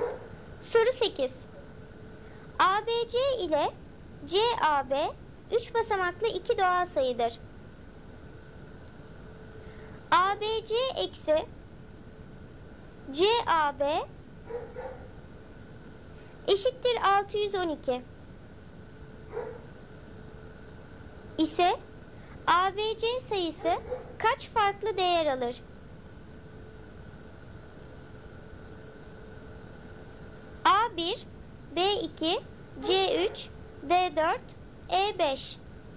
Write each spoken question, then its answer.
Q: ise ABC sayısı kaç farklı değer alır?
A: Doğru cevap B2.